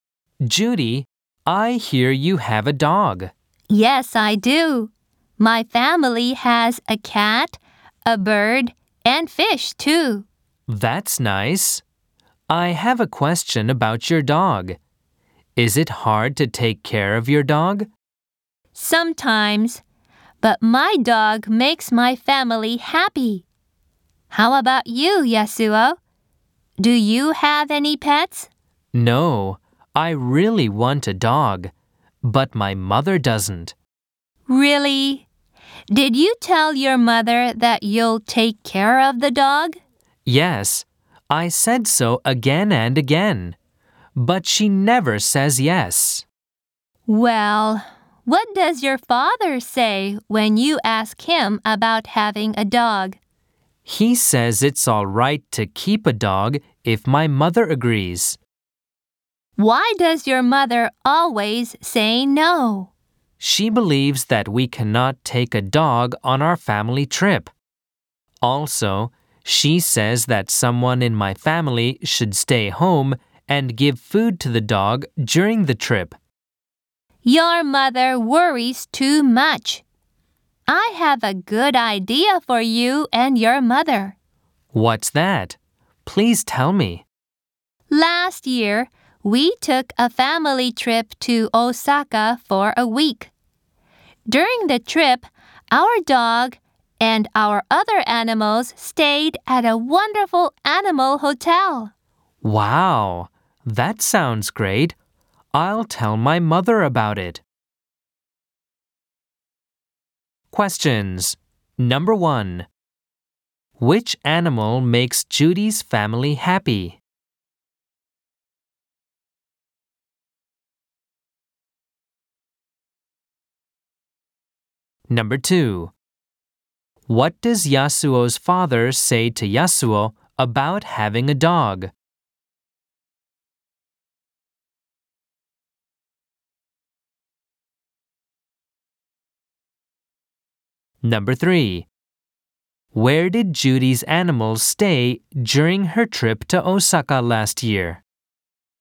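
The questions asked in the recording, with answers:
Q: Which animal makes Judy's family happy?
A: Her dog

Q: What does Yasuo's father say to Yasuo about having a dog?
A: It's all right to keep a dog if his mother agrees

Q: Where did Judy's animals stay during her trip to Osaka last year?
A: At an animal hotel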